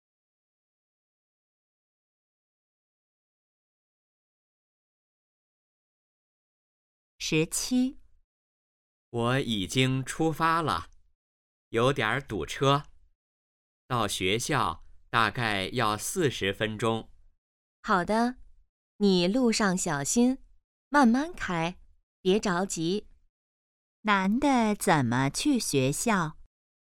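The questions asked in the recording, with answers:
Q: 男的怎么去学校?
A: 开车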